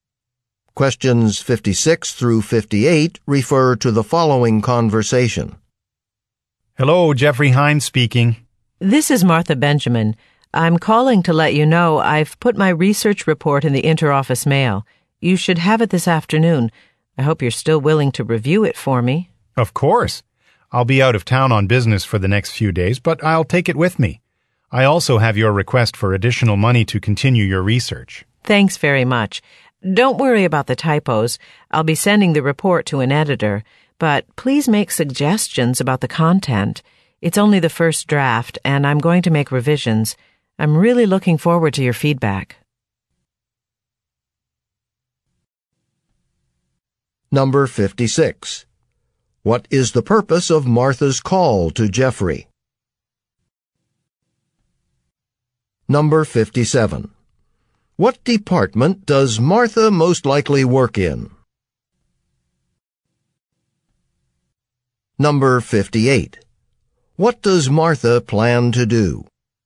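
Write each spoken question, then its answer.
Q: What is the purpose of Martha's call to Jeffrey?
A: To tell him she has sent her research report for him to review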